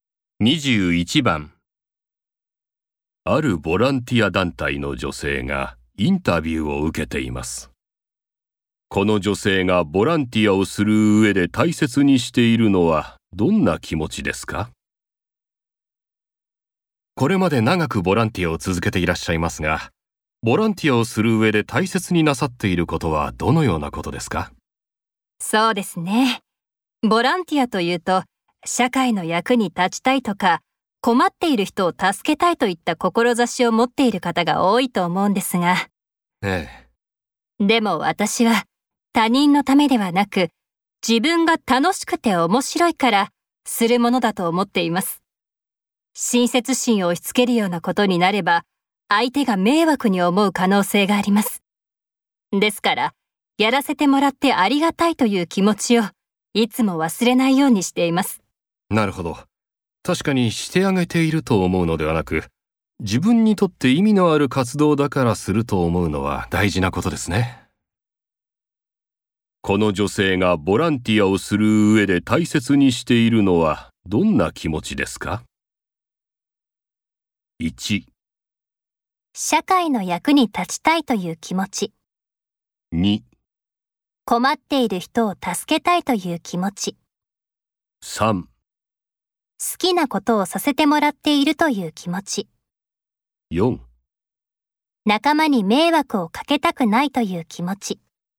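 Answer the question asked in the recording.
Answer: 3: 好きなことをさせてもらっているという気持ち。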